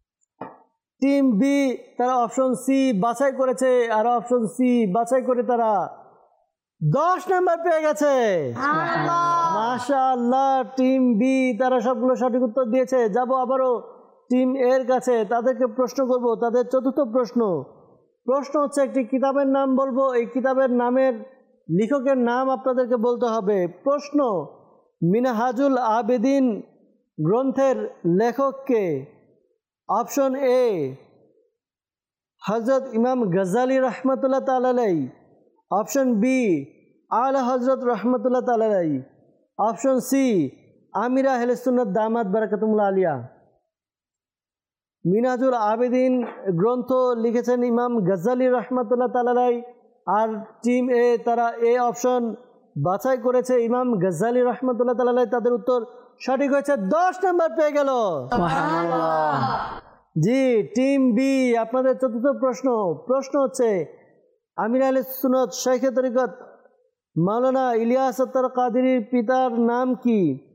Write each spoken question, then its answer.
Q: মিনহাজুল আবেদিন গ্রন্থের লেখক কে?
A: মিনহাজুল আবেদিন গ্রন্থ লিখেছেন ইমাম গাজ্জালি রহমতুল্লাহ তাআলাই